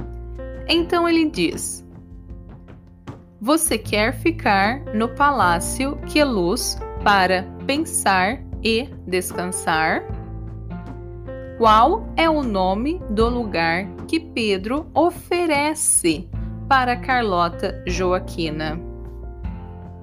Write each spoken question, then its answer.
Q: Qual é o nome do lugar que Pedro oferece para Carlota Joaquina?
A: Ele oferece o palácio que é luz para que ela pense e descanse.